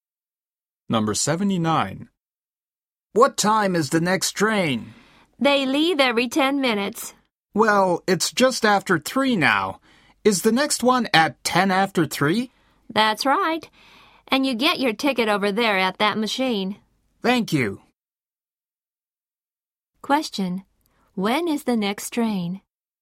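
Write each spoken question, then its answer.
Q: When is the next train?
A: At 3:10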